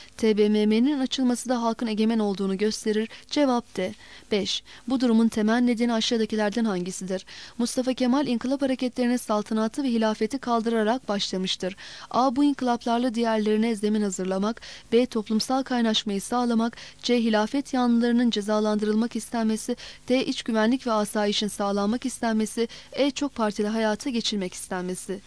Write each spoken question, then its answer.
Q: Bu durumun temel nedeni aşağıdakilerden hangisidir?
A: Cevap A.